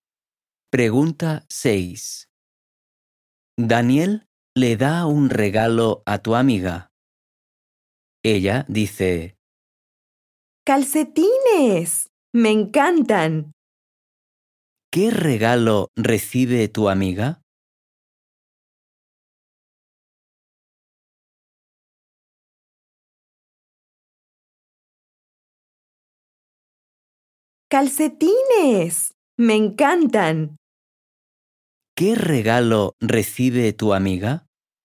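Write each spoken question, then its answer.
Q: ¿Qué regalo recibe tu amiga?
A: Calcetines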